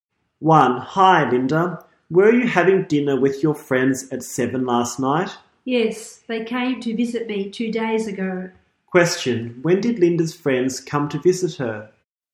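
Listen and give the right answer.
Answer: Two days ago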